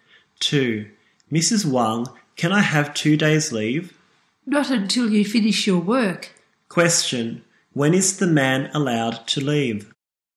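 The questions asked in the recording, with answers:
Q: When is the man allowed to leave?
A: After he finishes his work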